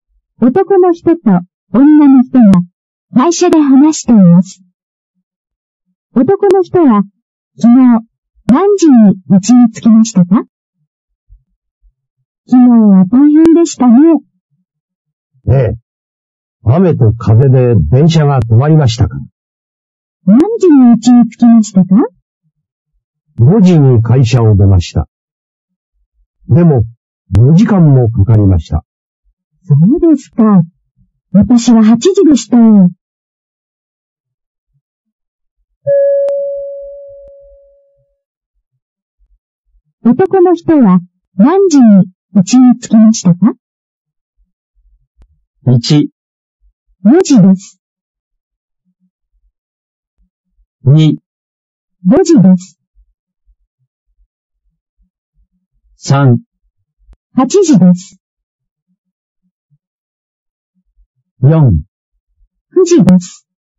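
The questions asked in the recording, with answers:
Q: 男の人は何時に家に着きましたか?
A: 4: 9時です。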